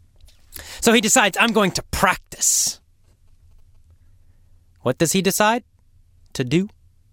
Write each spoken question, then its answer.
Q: What does he decide to do?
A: To practice. He decides to practice.